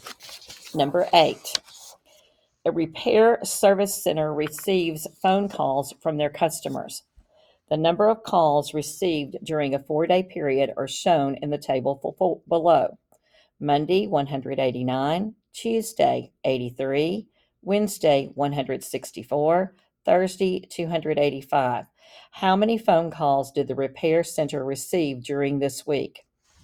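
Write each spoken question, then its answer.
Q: How many phone calls did the repair center receive during this week?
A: 721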